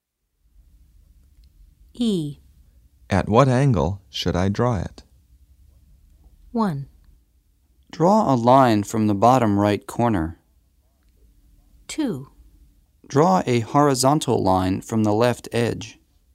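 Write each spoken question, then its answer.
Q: At what angle should I draw it?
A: 2: Draw a horizontal line from the left edge.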